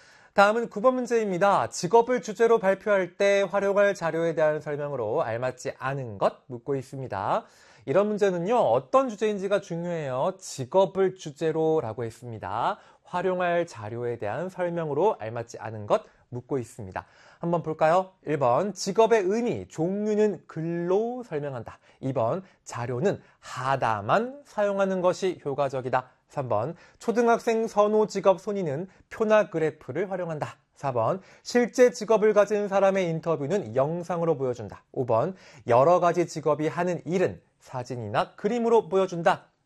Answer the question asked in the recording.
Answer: 바로 2번, 자료는 하나만 사용하는 것이 효과적이다.